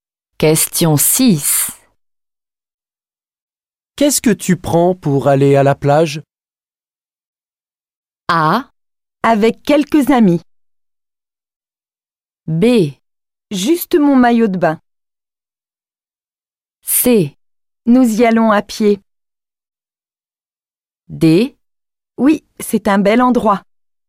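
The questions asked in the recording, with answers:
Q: Qu'est-ce que tu prends pour aller à la plage?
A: B: Juste mon maillot de bain.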